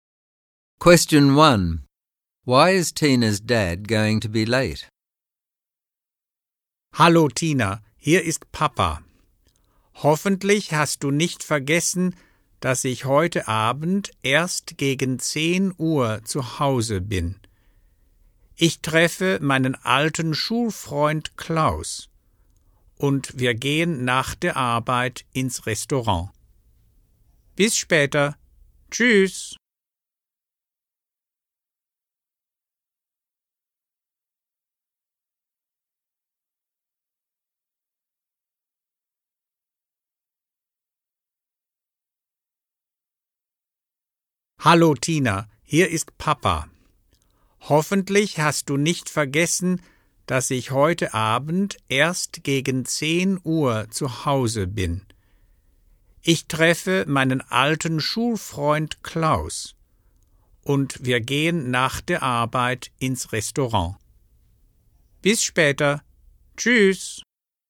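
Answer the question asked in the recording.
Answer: He is meeting his old school friend Klaus and they are going to a restaurant after work.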